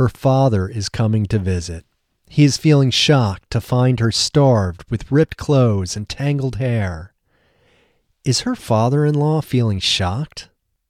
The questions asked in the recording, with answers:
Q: Is her father-in-law feeling shocked?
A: No, her father-in-law isn't feeling shocked.